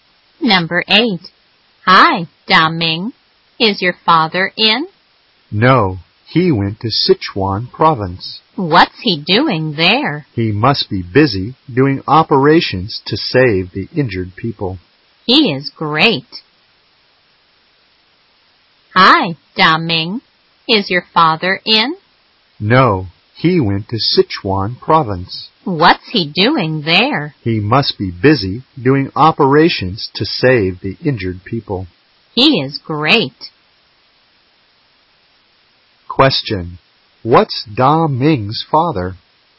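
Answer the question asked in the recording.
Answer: A doctor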